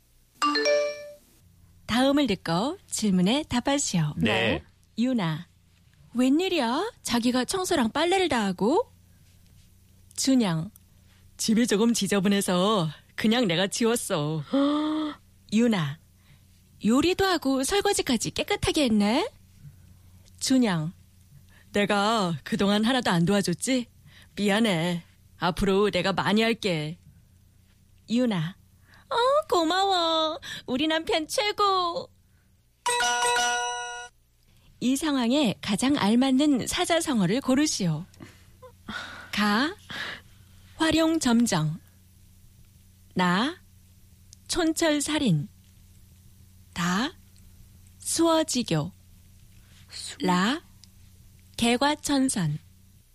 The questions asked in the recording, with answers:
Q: 이 상황에 가장 알맞는 사자성어를 고르시오.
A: And that was the correct answer, which I got right.